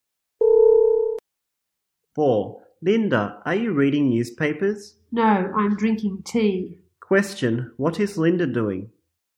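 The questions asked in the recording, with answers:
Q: What is Linda doing?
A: Drinking tea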